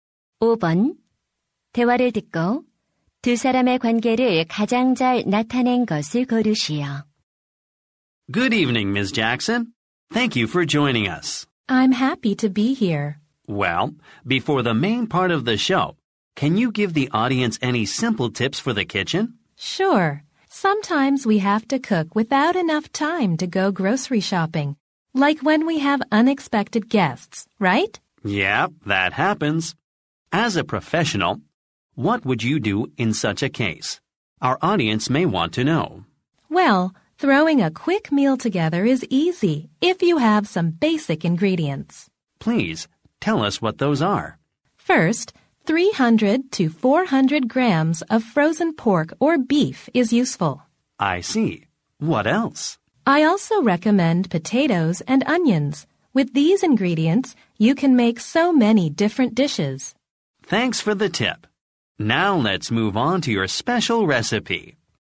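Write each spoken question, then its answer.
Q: 대화를 듣고 두 사람의 관계를 가장 잘 나타낸 것을 고르시오.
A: 방송 진행자 - 요리 전문가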